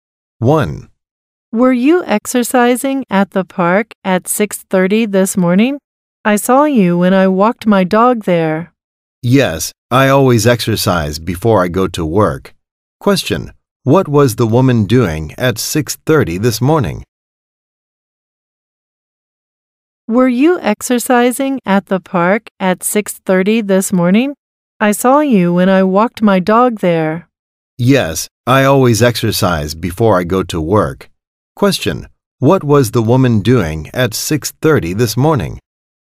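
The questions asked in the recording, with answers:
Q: Question, what was the woman doing at 6:30 this morning?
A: Exercising at the park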